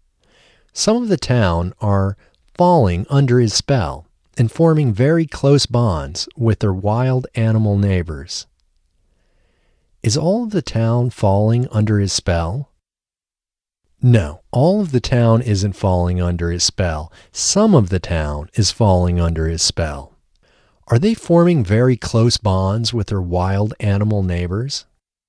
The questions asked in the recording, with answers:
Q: Are they forming very close bonds with their wild animal neighbors?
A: Yes, they are forming very close bonds with their wild animal neighbors.